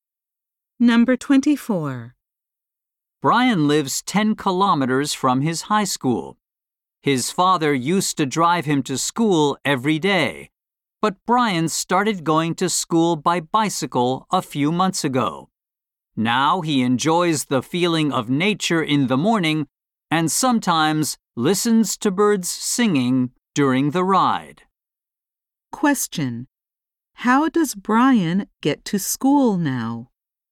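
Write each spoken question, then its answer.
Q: How does Brian get to school now?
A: By bicycle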